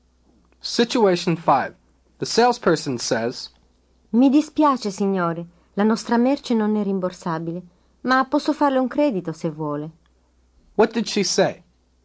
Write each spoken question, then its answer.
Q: What did she say?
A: She said, I'm sorry, sir. Our merchandise is not refundable. But I can give you credit if you wish.